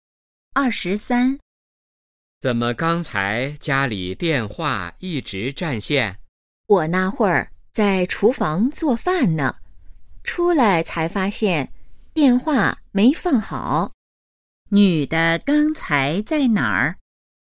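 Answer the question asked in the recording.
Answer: 厨房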